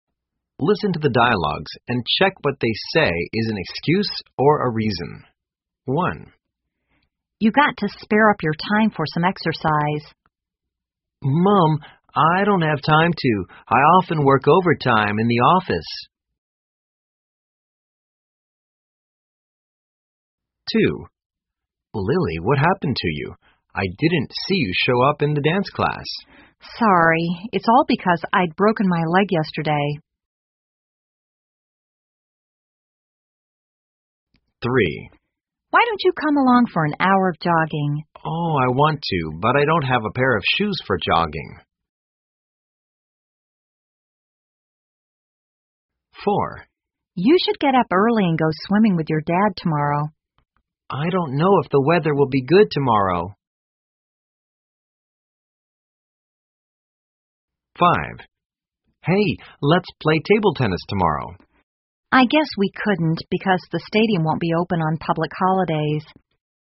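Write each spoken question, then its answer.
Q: check what they say is an excuse or a reason.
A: a reason

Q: check what they say is an excuse or a reason.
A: an excuse

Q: check what they say is an excuse or a reason.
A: a reason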